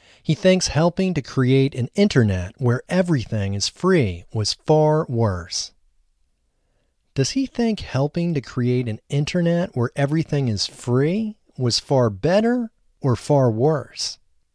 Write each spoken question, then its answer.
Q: Does he think helping to create an internet where everything is free was far better or far worse?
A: He thinks helping to create an internet where everything is free was far worse.